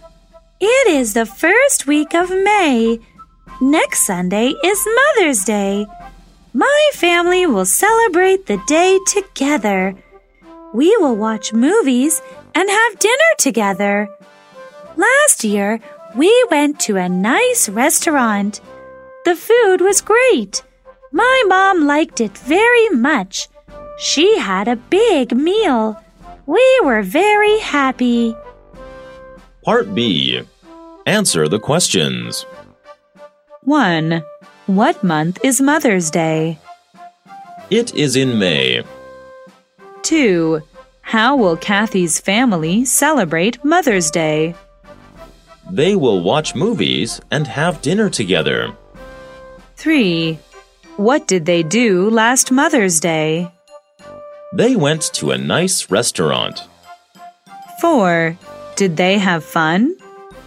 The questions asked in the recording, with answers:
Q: What month is Mother's Day?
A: It is in May.

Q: How will Kathy's family celebrate Mother's Day?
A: They will watch movies and have dinner together.

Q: Did they have fun?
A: Yes, they did.